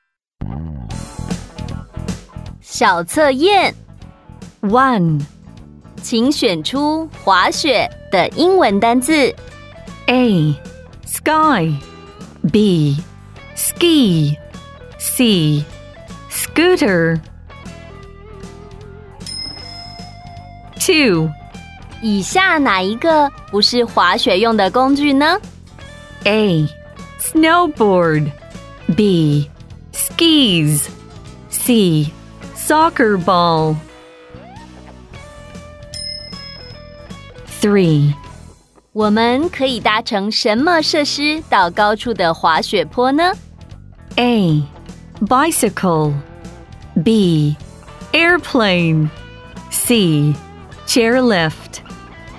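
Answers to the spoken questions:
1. B: ski
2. C: soccer ball
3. C: Chairlift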